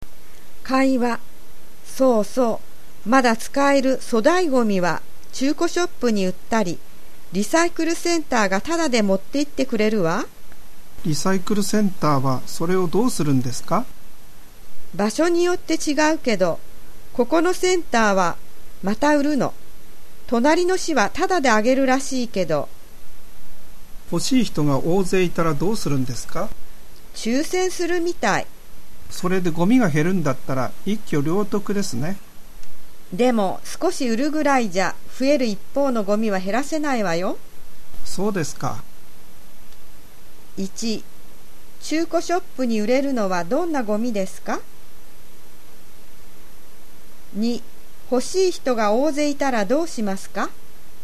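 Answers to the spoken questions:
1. まだ使える粗大ごみ
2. 抽選する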